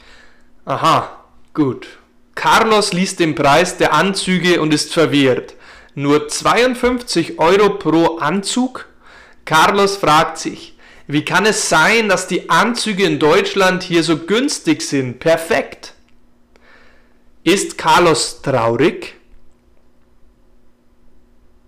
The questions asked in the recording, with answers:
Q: Ist Carlos traurig?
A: Nein, Carlos ist nicht traurig.